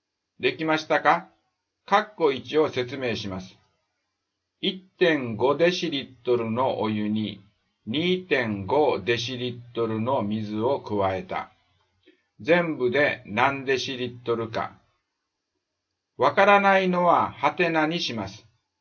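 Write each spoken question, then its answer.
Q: 1.5 デシリットルのお湯に 2.5 デシリットルの水を加えた。 全部で何デシリットルか。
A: 4デシリットル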